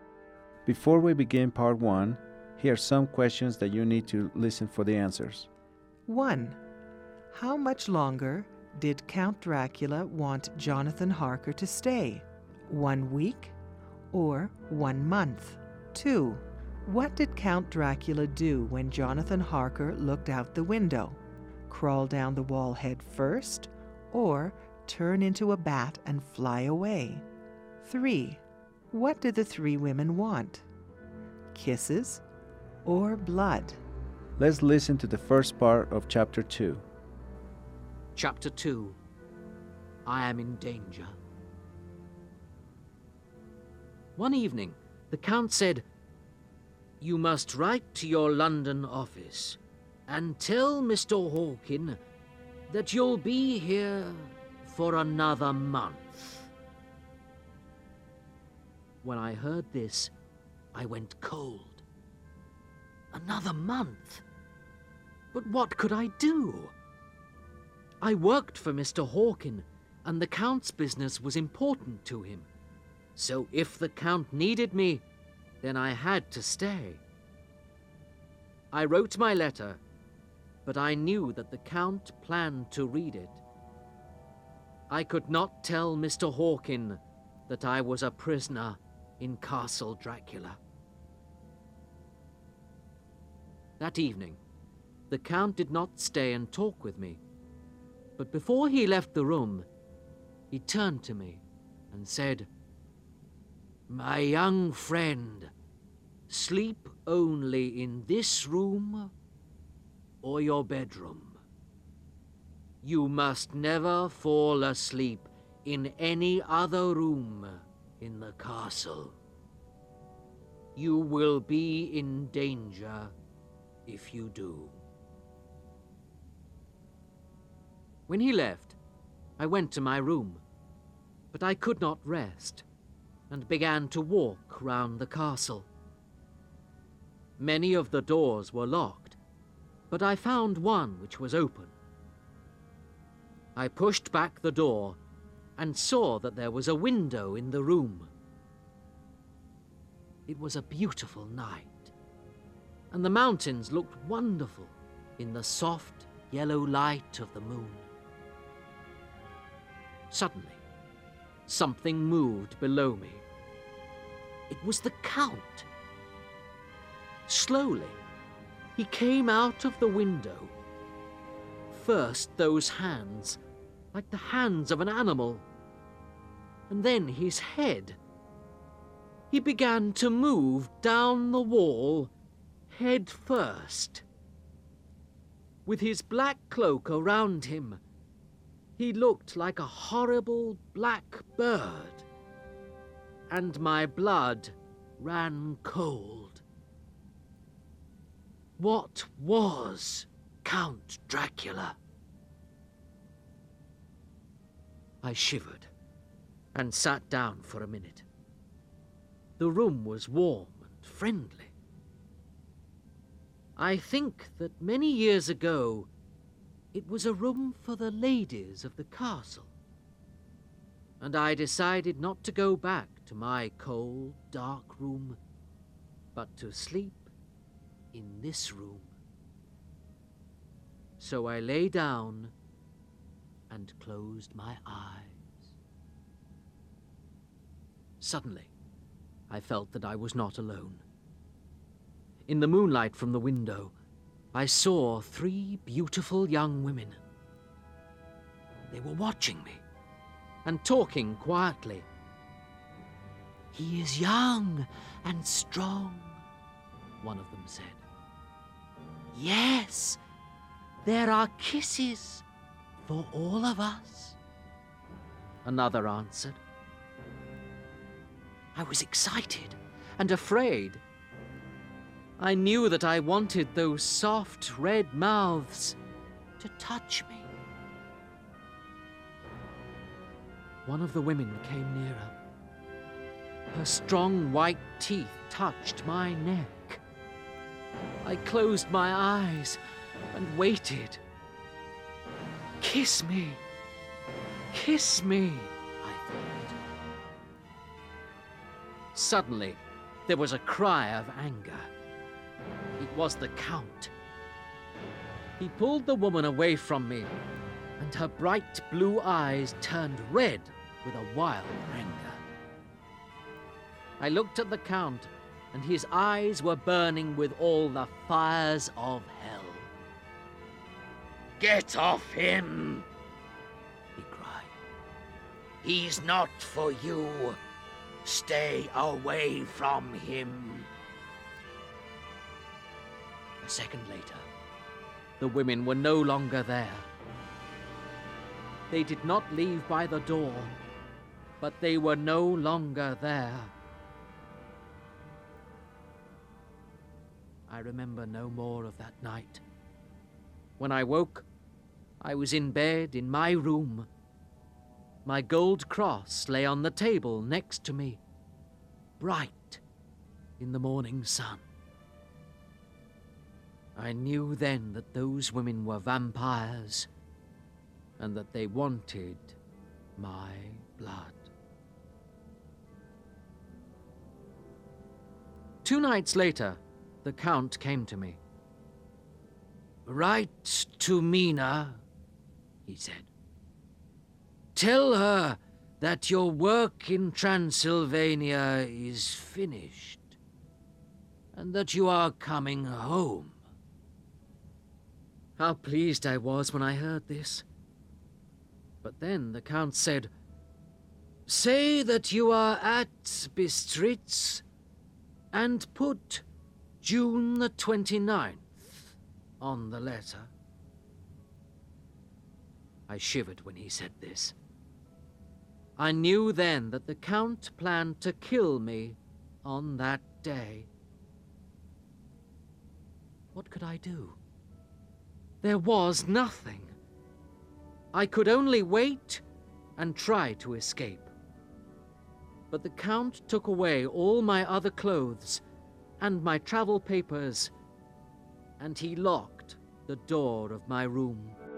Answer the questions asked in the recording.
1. Count Dracula told Jonathan that he wanted him to stay for another month.
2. It was Count Dracula crawling down the wall head first.
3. It was then that Jonathan knew that they had wanted his blood.